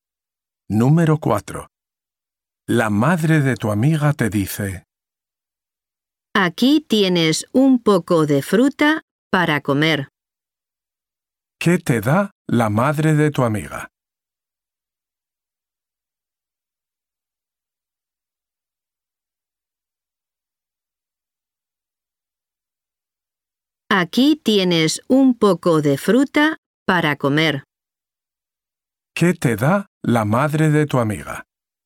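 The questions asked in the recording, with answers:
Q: ¿Qué te da la madre de tu amiga?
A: Un poco de fruta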